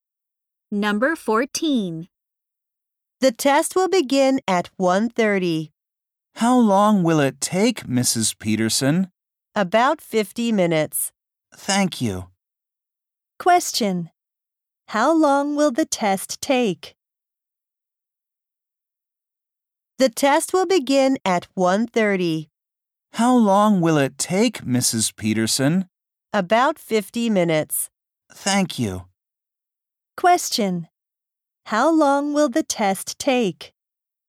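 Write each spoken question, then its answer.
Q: How long will the test take?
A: About 50 minutes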